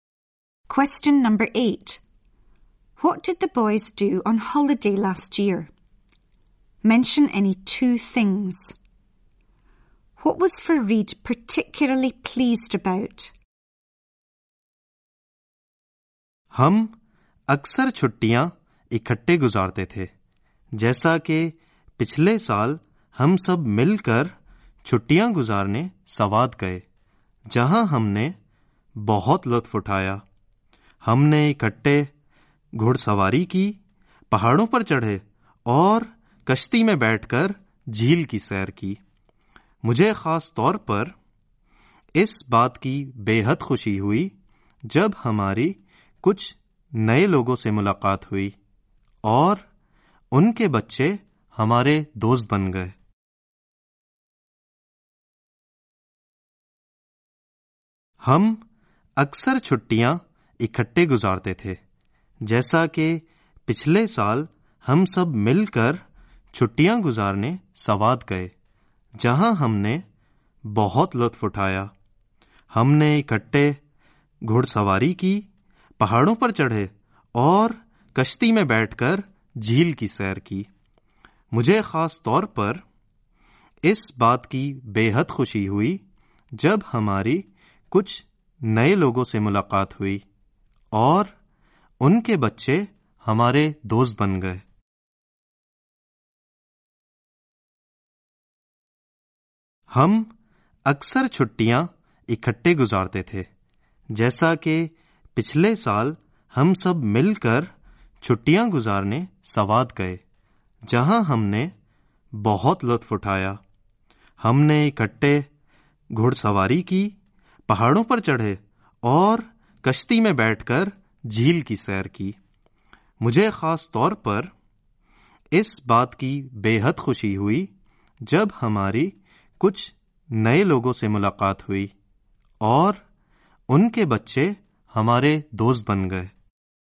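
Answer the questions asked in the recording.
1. Went horse riding, climbed mountains, took a boat trip on the lake (any two)
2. Meeting new people whose children became their friends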